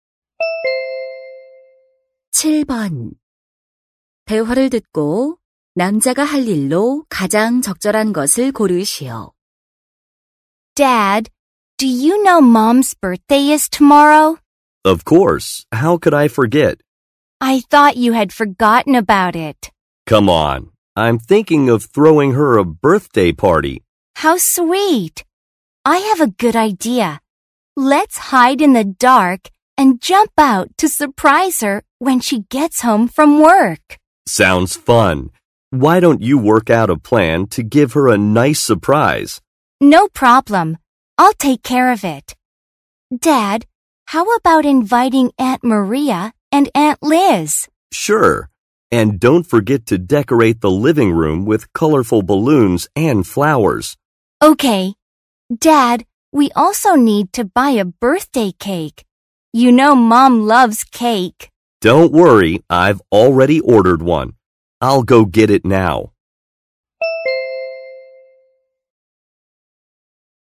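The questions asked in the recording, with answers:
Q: 대화를 듣고 남자가 할 일로 가장 적절한 것을 고르시오.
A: 주문한 생일 케이크 가지러 가기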